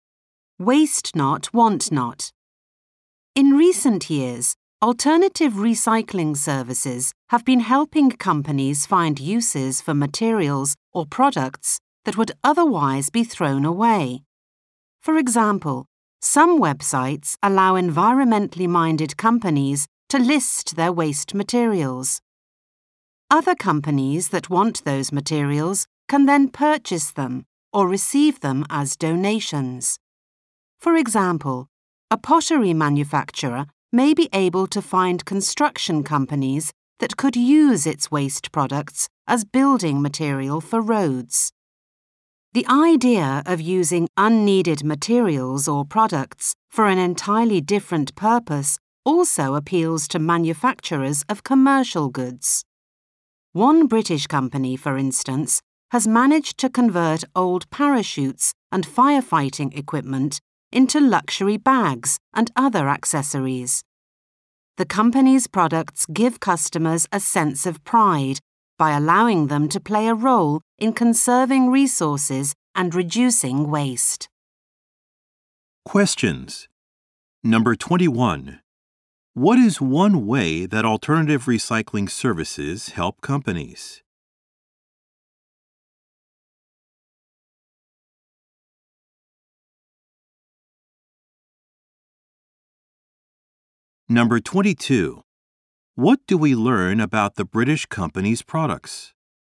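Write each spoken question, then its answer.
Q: What is one way that alternative recycling services help companies?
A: They help companies find others that can use their waste materials.

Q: What do we learn about the British company's products?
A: They are made from old parachutes and firefighting equipment and make customers proud to help reduce waste.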